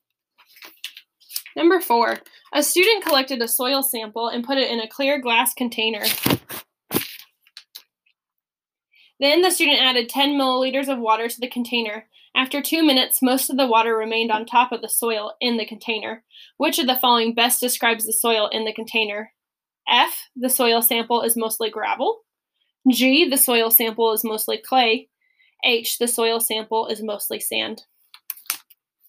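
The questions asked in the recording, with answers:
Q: Which of the following best describes the soil in the container?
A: G: the soil sample is mostly clay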